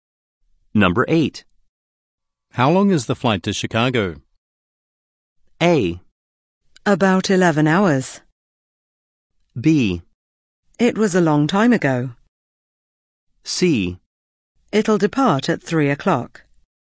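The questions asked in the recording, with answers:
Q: How long is the flight to Chicago?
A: A: About 11 hours.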